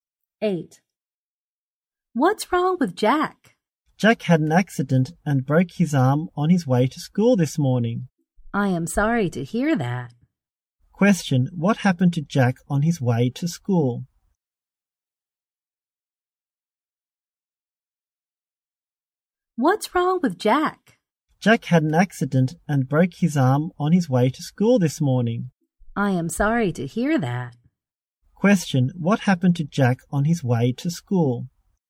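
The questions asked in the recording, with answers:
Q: what happened to Jack on his way to school?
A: He had an accident and broke his arm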